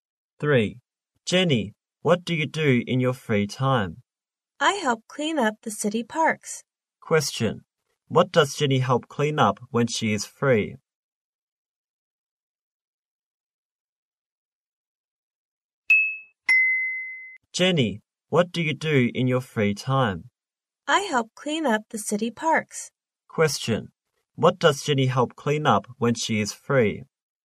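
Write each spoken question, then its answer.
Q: What does Jenny help clean up when she is free?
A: The city parks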